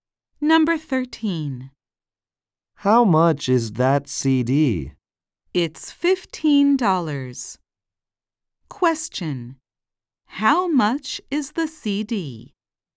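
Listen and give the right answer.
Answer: $15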